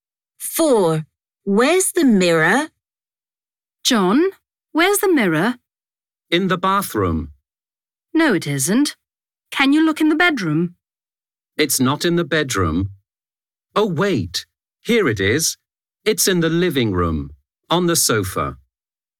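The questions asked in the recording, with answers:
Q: Where's the mirror?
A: In the living room, on the sofa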